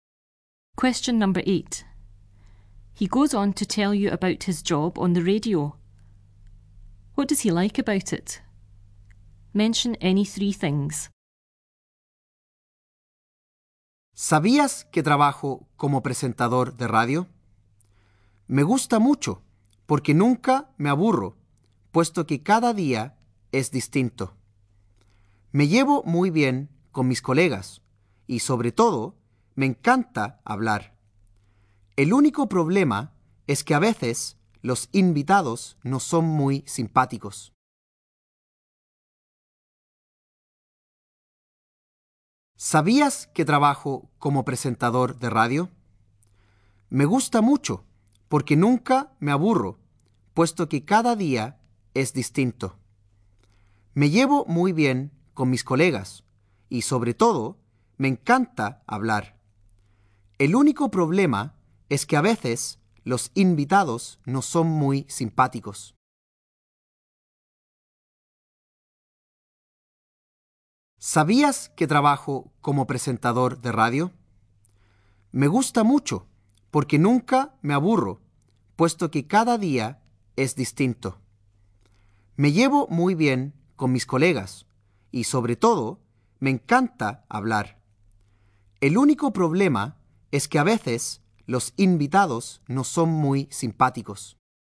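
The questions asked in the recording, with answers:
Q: What does he like about it?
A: He never gets bored because every day is different; he gets on well with colleagues; he loves talking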